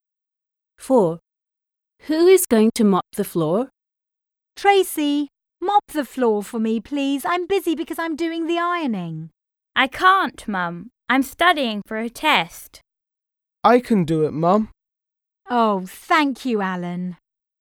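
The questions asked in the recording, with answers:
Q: Who is going to mop the floor?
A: Alan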